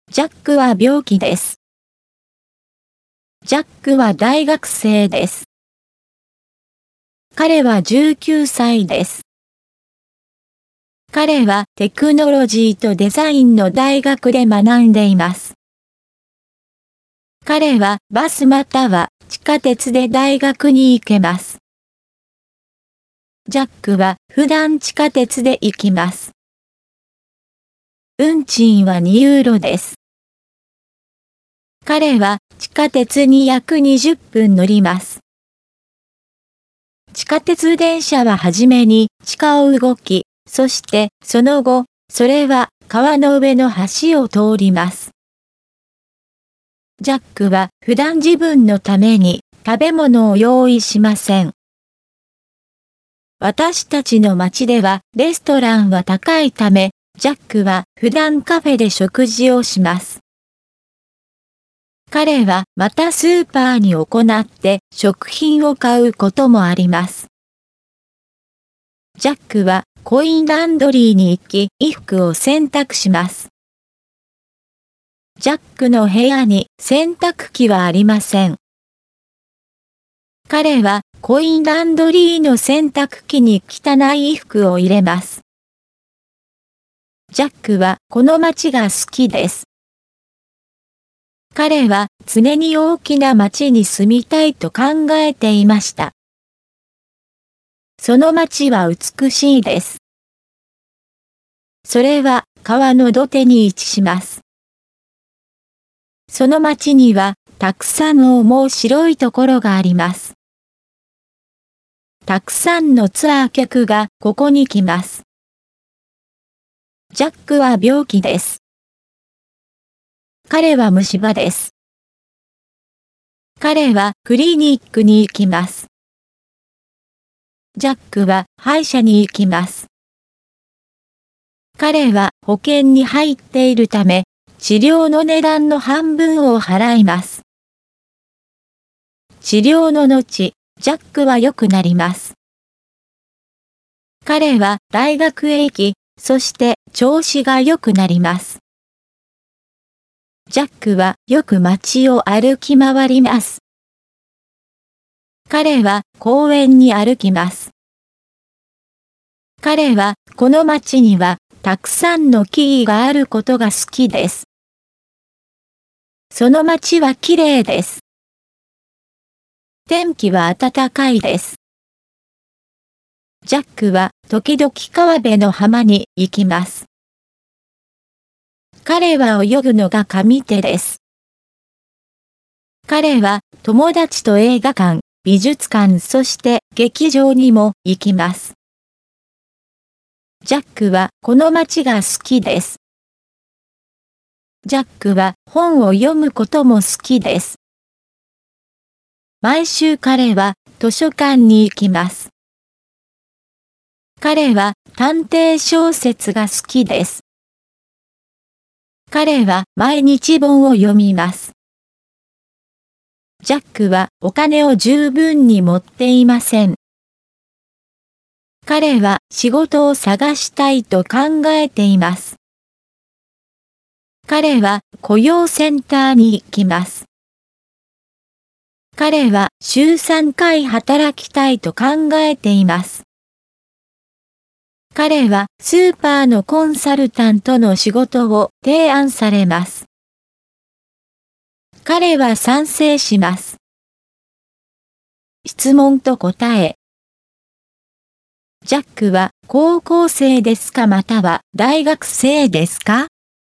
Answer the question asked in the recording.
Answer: ジャックは大学生です。